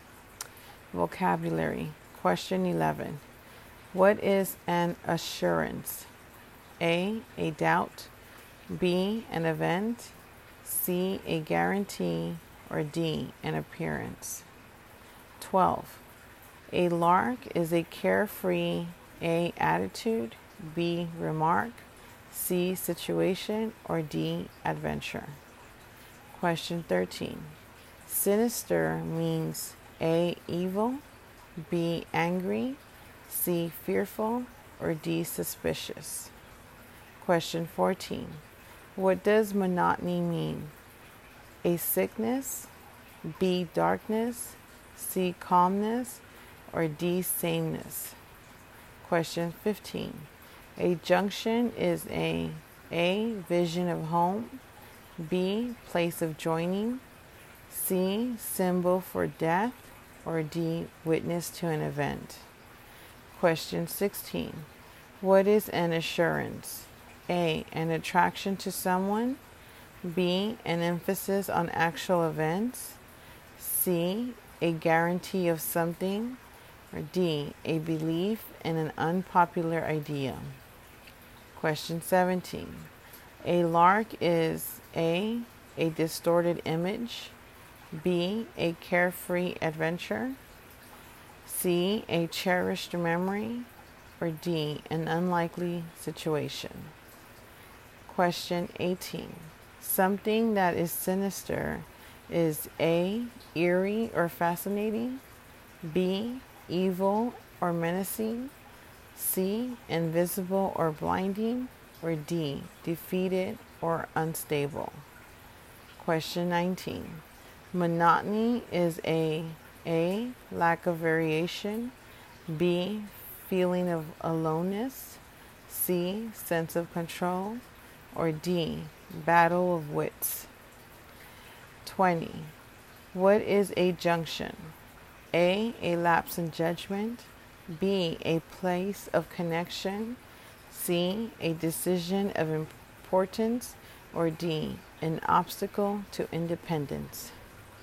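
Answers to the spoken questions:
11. C: a guarantee
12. D: adventure
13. A: evil
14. D: sameness
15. B: place of joining
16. C: a guarantee of something
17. B: a carefree adventure
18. B: evil or menacing
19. A: lack of variation
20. B: a place of connection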